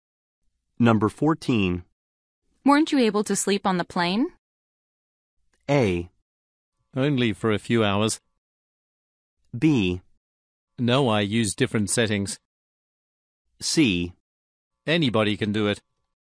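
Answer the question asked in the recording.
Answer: A: Only for a few hours.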